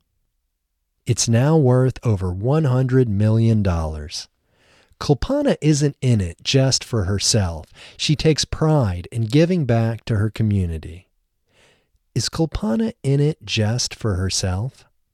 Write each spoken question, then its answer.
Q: Is Kulpana in it just for herself?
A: No, Kulpana isn't in it just for herself.